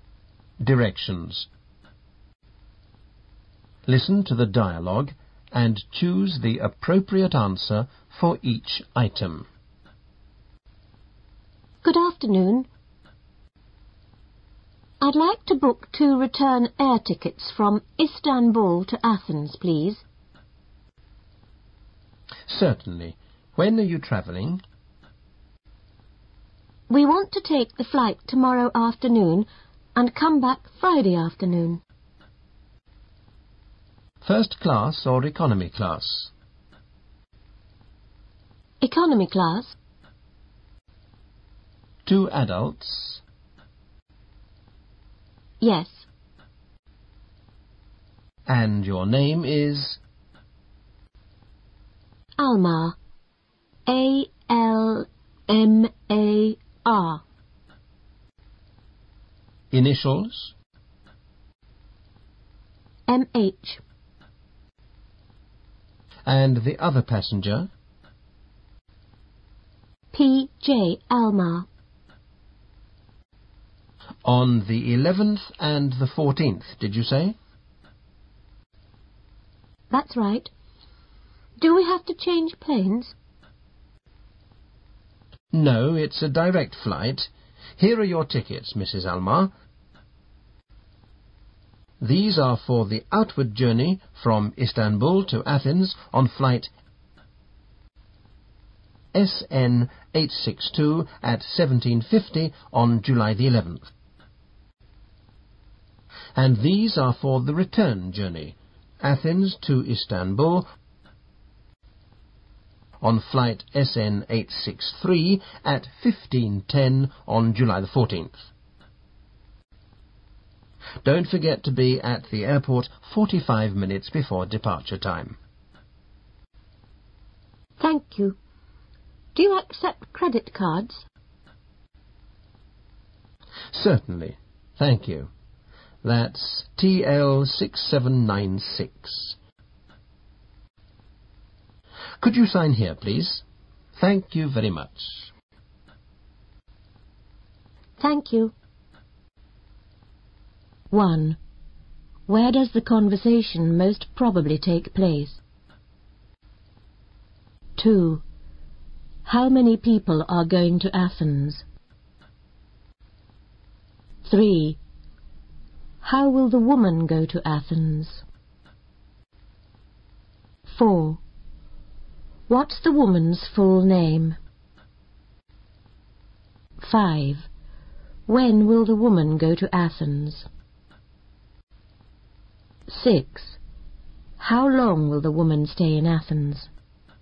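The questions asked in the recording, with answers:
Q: How many people are going to Athens?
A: Two

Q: How will the woman go to Athens?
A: By plane (direct flight)

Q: What's the woman's full name?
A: M. H. Almar

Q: When will the woman go to Athens?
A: At 17:50 on July 11th

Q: How long will the woman stay in Athens?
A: Three days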